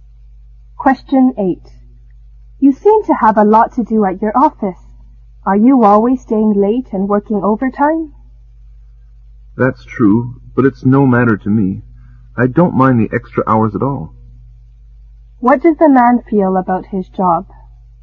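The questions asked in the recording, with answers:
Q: What does the man feel about his job?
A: He doesn't mind the extra hours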